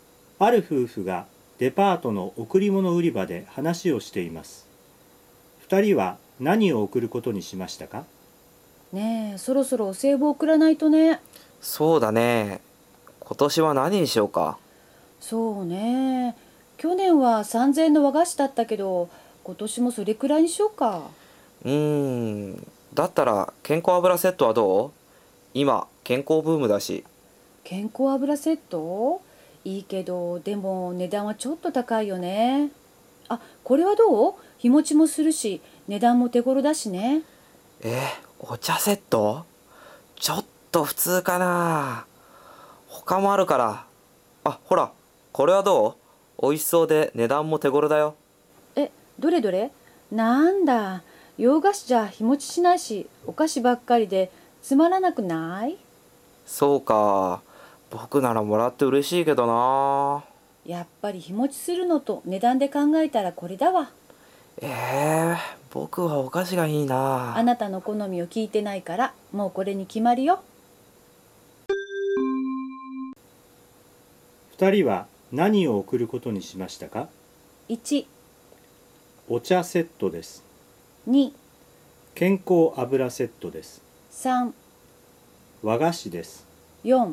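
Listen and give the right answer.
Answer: 1: お茶セットです。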